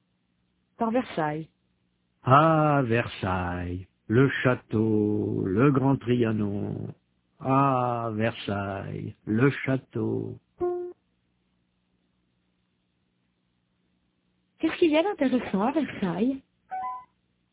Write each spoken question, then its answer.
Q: Qu'est-ce qu'il y a d'intéressant à Versailles ?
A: Le château.